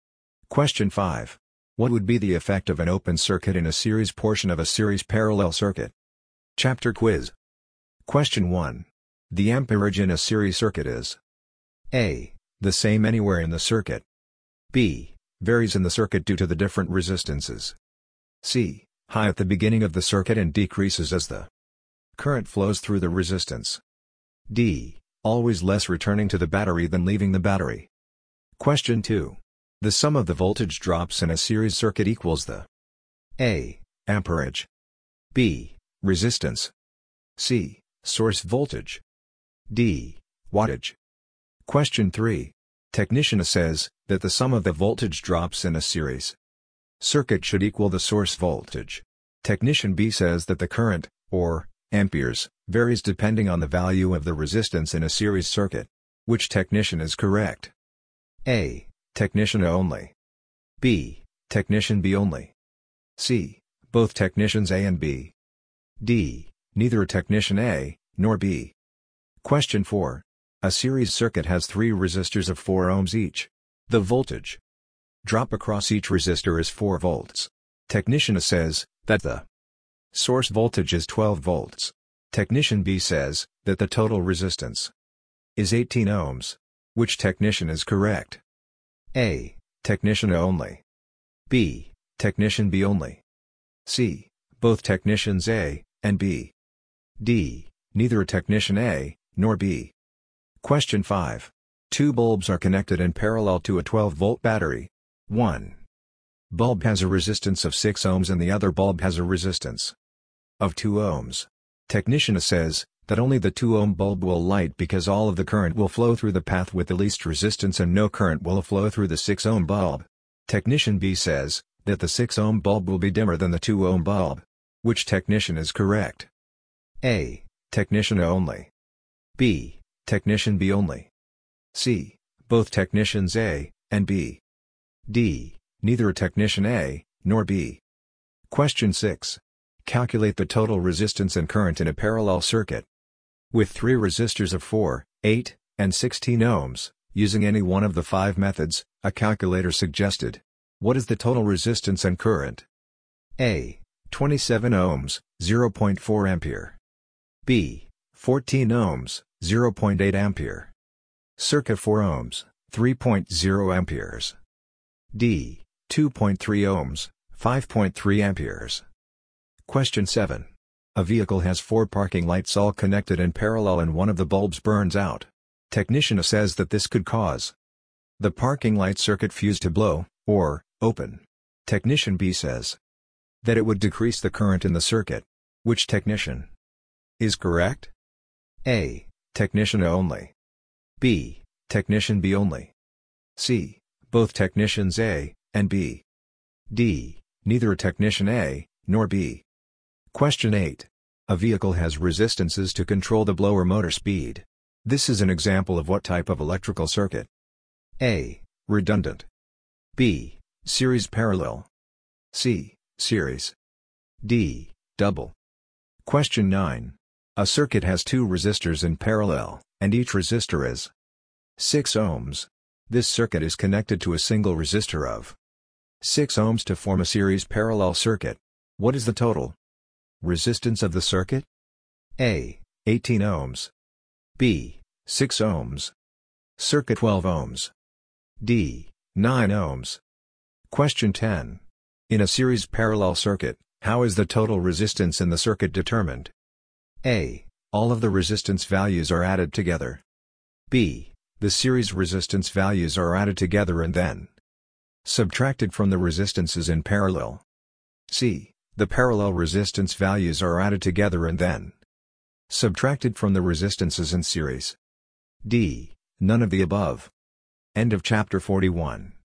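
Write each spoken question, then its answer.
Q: Which technician is correct?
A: A: Technician A only.

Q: What is the total resistance of the circuit?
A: D: 9 ohms.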